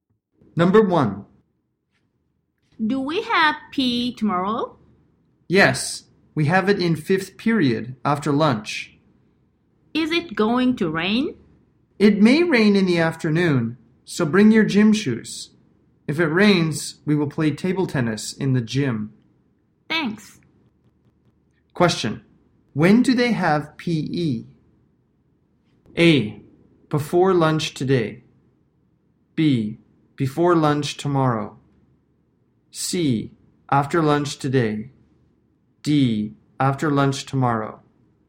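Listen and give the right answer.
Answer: D: After lunch tomorrow.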